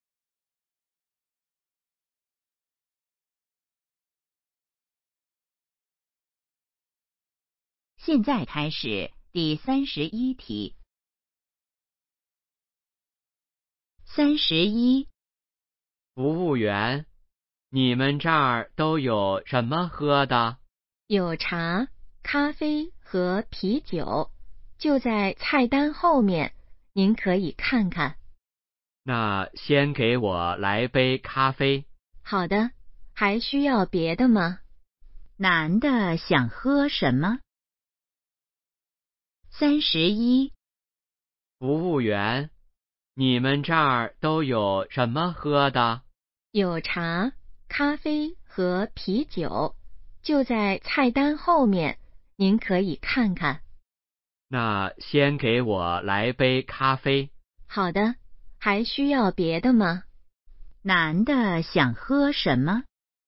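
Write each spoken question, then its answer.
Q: 男的想喝什么?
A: 咖啡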